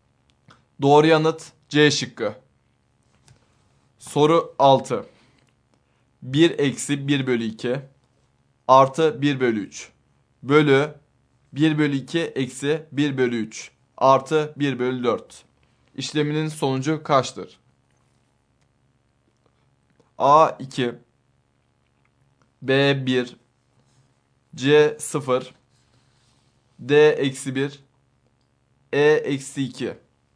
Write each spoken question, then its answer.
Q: İşleminin sonucu kaçtır?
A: Doğru yanıt A şıkkı.